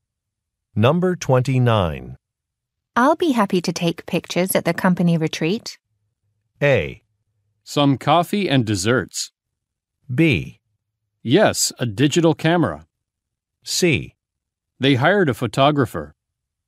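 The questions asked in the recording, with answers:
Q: I'll be happy to take pictures at the company retreat.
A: C: They hired a photographer.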